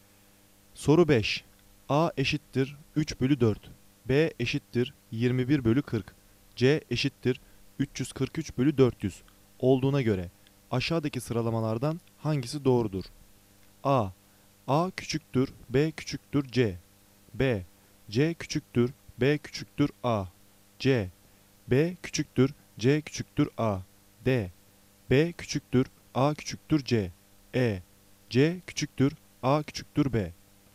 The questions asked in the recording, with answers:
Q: B eşittir 21 bölü 40. C eşittir 343 bölü 400 olduğuna göre aşağıdaki sıralamalardan hangisi doğrudur?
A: Doğru cevap D. B küçüktür, A küçüktür, C.